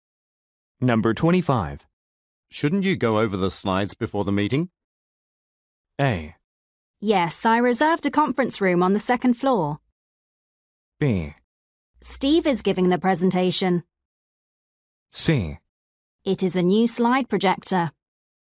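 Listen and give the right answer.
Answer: B: Steve is giving the presentation.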